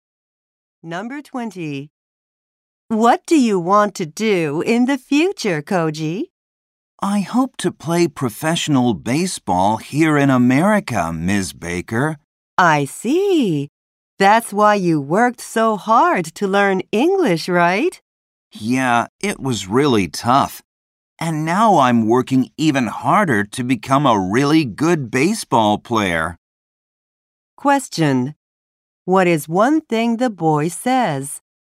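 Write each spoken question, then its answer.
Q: What is one thing the boy says?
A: He wants to play professional baseball in America.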